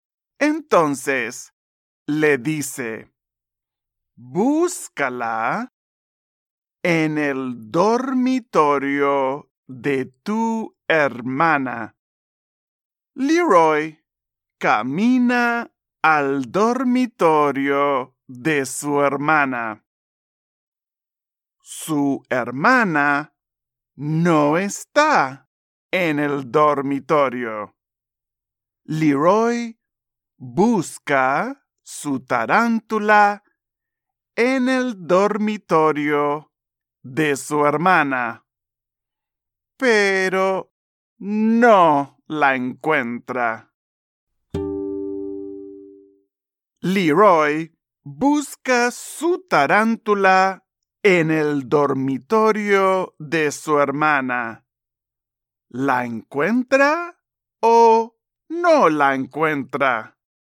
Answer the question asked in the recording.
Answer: Así es. No la encuentra.